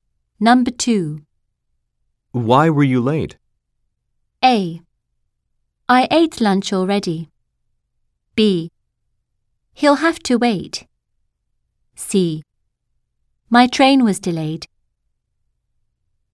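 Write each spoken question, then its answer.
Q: Why were you late?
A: C: My train was delayed.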